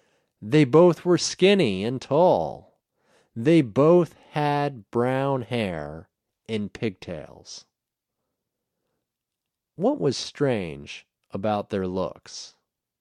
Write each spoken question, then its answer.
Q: What was strange about their looks?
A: They both were skinny and tall, and they both had brown hair with pigtails.